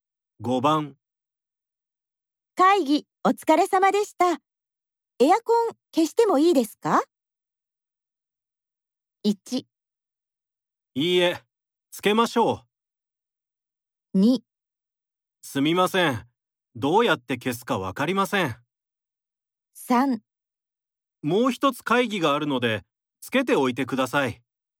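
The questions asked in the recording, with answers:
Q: 会議お疲れ様でした。エアコン消してもいいですか?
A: 3: もう一つ会議があるので、つけておいてください。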